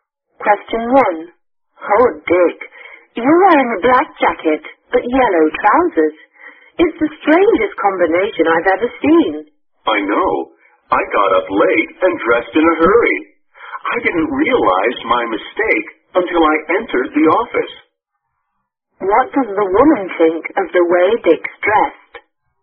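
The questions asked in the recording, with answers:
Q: What does the woman think of the way Dick's dressed?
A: She thinks it's a very strange combination.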